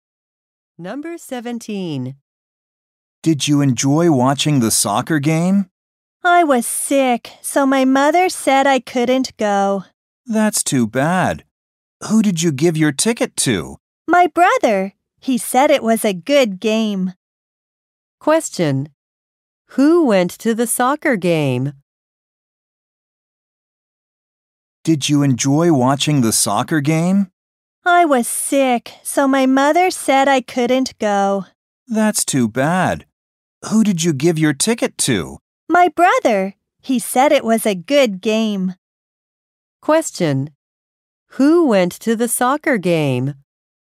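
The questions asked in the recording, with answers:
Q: Who went to the soccer game?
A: The speaker's brother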